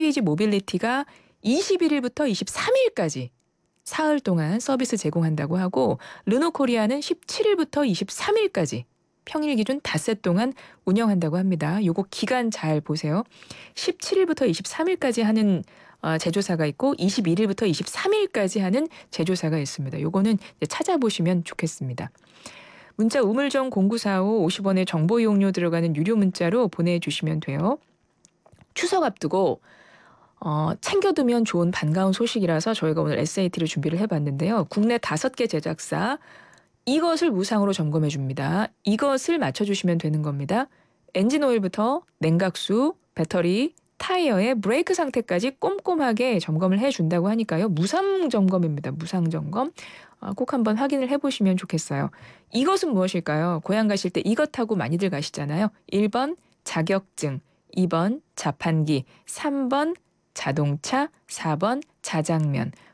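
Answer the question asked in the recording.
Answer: 3번: 자동차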